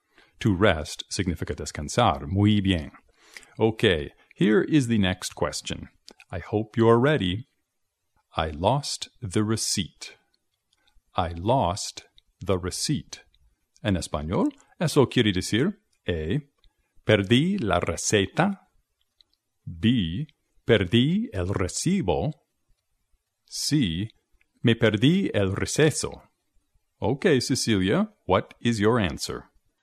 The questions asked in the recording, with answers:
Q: I lost the receipt.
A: I lost the receipt. Perdí el recibo.